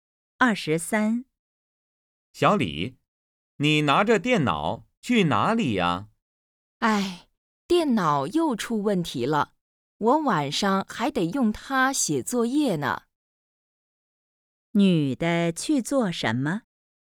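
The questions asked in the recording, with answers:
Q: 女的去做什么?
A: 修电脑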